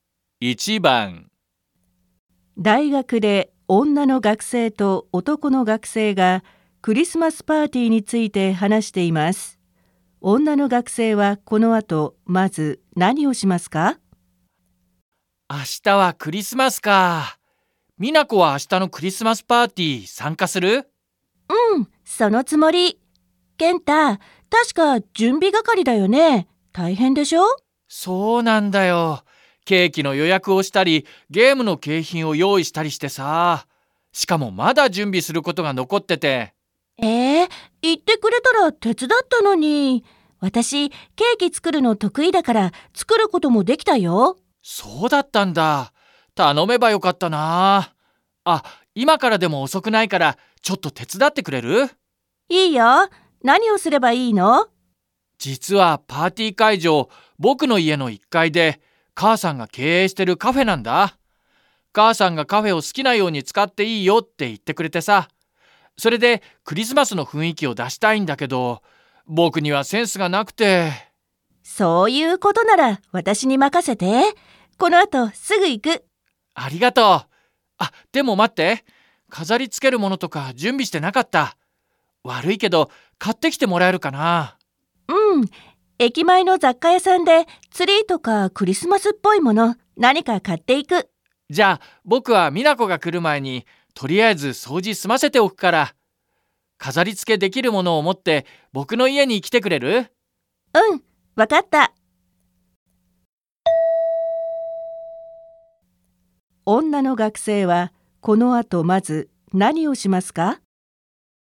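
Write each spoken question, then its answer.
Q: 女の学生はこの後まず何をしますか?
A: 駅前の雑貨屋で飾り付けるもの(ツリーなど)を買う

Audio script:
大学で女の学生と男の学生がクリスマスパーティーについて話しています。
M:明日はクリスマスかあ、美奈子は明日のクリスマスパーティー、参加する?Ngày mai là Giáng sinh à, Minako ngày mai cậu có tham gia tiệc Giáng sinh không?
F:うん、そのつもり。健太、確か準備係りだよね?大変でしょ?
M:そうなんだよ。ケーキの予約をしたり、ゲームの景品(けいひん)を用意したりしてさあ。しかも、まだ準備することが残ってて。
F:え、言ってくれたら手伝ったのに。私、ケーキ作るの得意だから作ることもできたよ。
M:そうだったんだ。頼めばよかったなあ。あ、今からでも遅くないから、ちょっと手伝ってくれる?Vậy à.
F:いいよ、何をすればいいの?Được chứ, tớ cần làm gì đây?
M:実は、パーティー会場、僕の家の一階で、母さんが経営してるカフェなんだ。母さんがカフェを好きなように使っていいよって言ってくれてさ。それでクリスマスの雰囲気を出したいんだけど。
F:そういうことなら私に任せて。このあと、すぐ行く。Nếu vậy thì hãy giao cho tớ. Tớ sẽ đi ngay.
M:ありがとう。あ、でも、待って。飾りつけるものとか準備してなかった。悪いけど買ってきてもらえるかな?Cảm ơn cậu.
F:うん、駅前の雑貨屋さんでツリーとかクリスマスっぽい物、何か買って行く。
M:じゃ、僕は美奈子が来る前にとりあえず掃除済ませておくから、飾りつけできるものをもって僕の家に来てくれる?Vậy, trước khi Minako đến, trước mắt tớ sẽ dọn dẹp cho xong trước.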